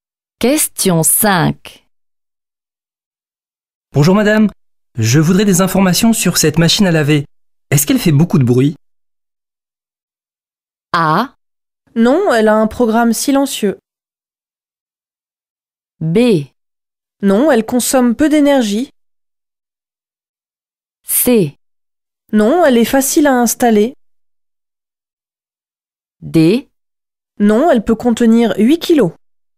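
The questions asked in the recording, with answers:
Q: Est-ce qu'elle fait beaucoup de bruit ?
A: A: Non, elle a un programme silencieux.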